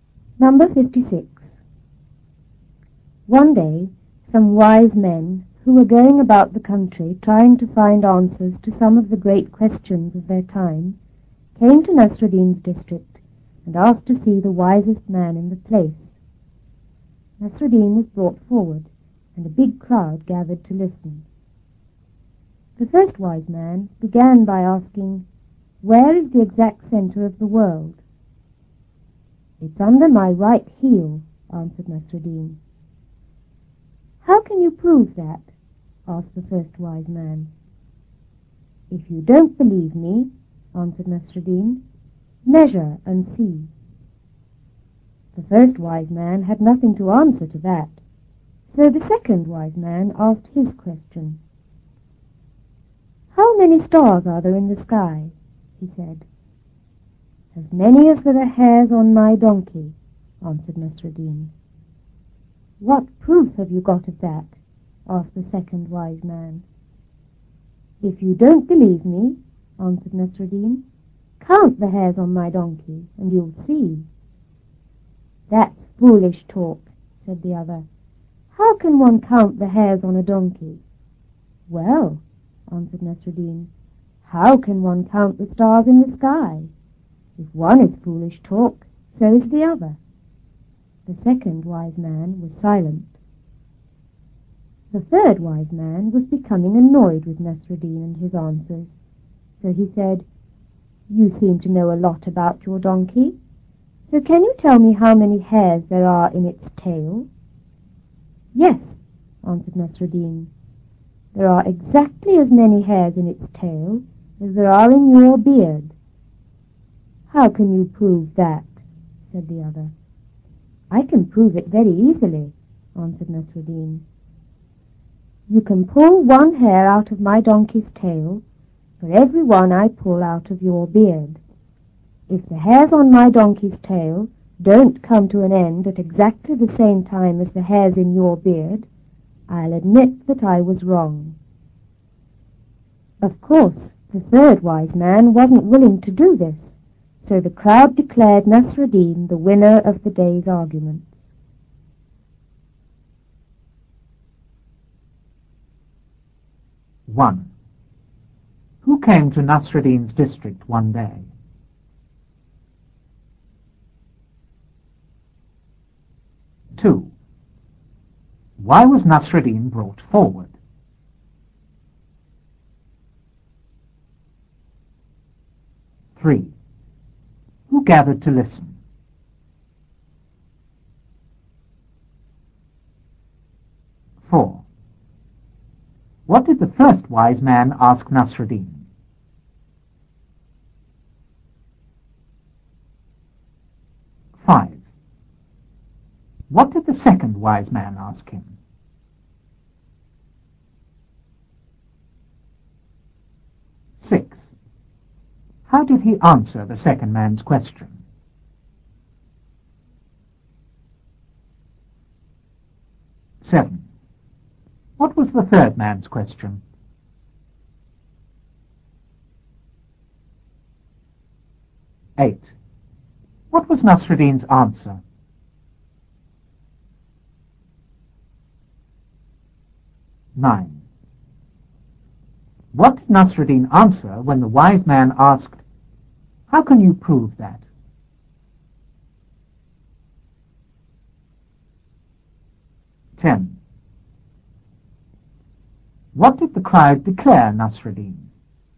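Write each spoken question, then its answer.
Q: Who came to Nasruddin's district one day?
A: Some wise men

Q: Why was Nasruddin brought forward?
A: Because the wise men asked to see the wisest man in the place

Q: Who gathered to listen?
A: A big crowd

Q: What did the first wise man ask Nasruddin?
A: Where the exact center of the world is

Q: What did the second wise man ask him?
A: How many stars there are in the sky

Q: How did he answer the second man's question?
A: As many as there are hairs on his donkey

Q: What was the third man's question?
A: How many hairs there are in the donkey's tail

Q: What was Nasruddin's answer?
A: Exactly as many as there are hairs in the wise man's beard

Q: What did the crowd declare Nasruddin?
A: The winner of the day's arguments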